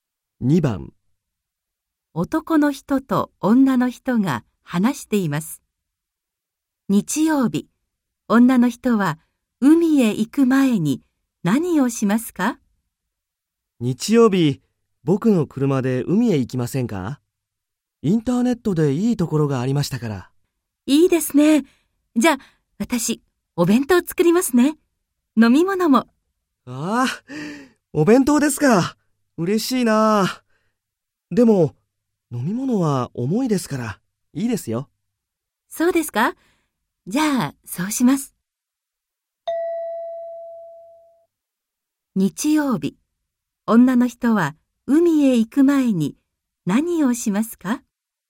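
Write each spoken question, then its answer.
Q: 日曜日、女の人は海へ行く前に何をしますか?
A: お弁当を作る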